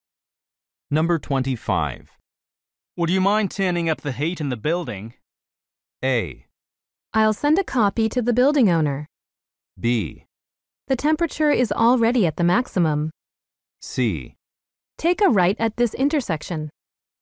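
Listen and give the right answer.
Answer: B: The temperature is already at the maximum.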